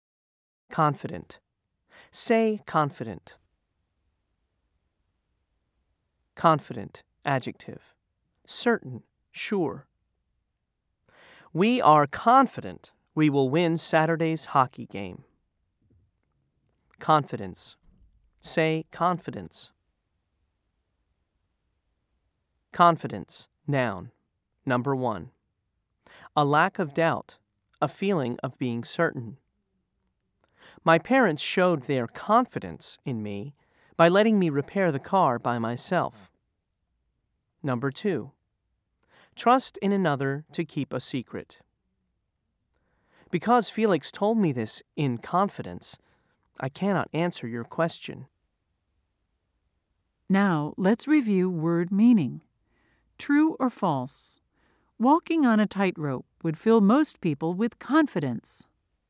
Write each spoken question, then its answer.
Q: True or false? Walking on a tightrope would fill most people with confidence.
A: If you said false, you are correct.